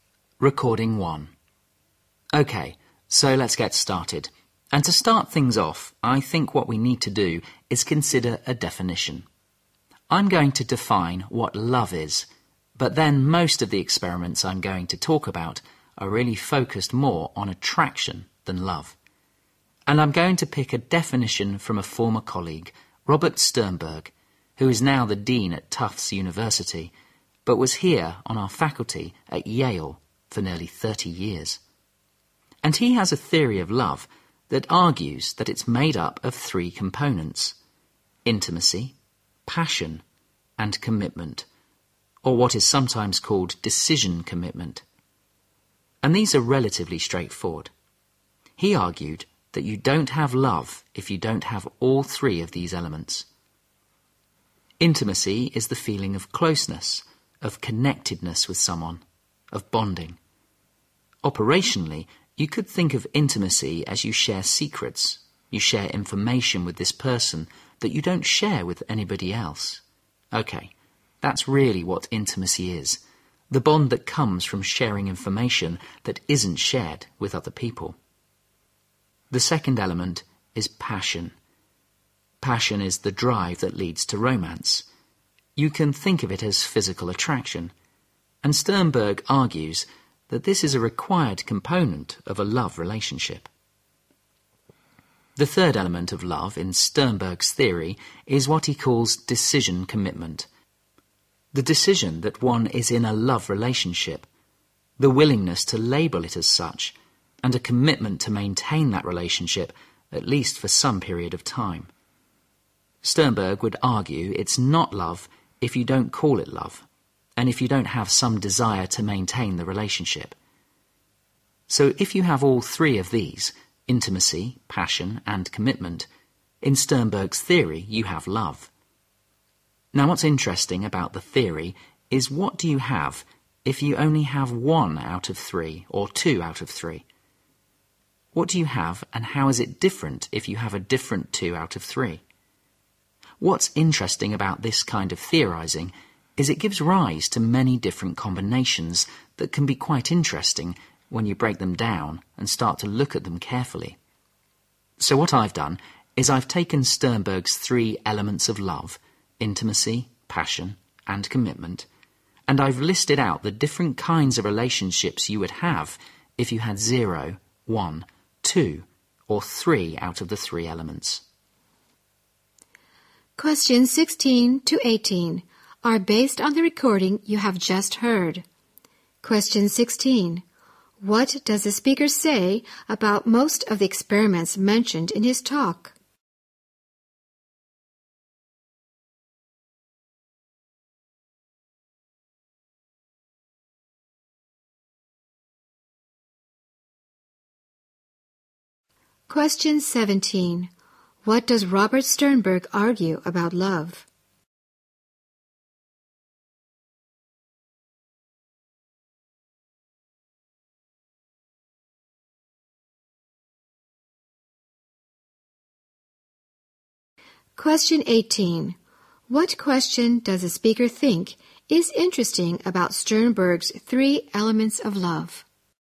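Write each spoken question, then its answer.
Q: What does the speaker say about most of the experiments mentioned in his talk?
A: They focus more on attraction than love.

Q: What does Robert Sternberg argue about love?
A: It needs all three: intimacy, passion and commitment.

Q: What question does the speaker think is interesting about Sternberg's 3 elements of love?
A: What you have if you have only one or two of the three elements.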